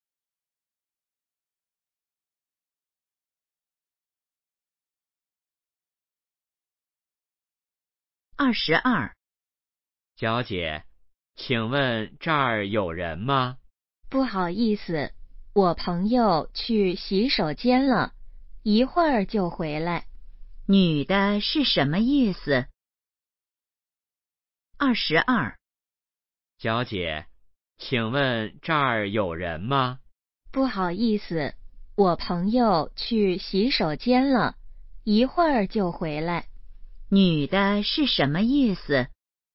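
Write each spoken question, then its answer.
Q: 女的是什么意思?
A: 这儿有人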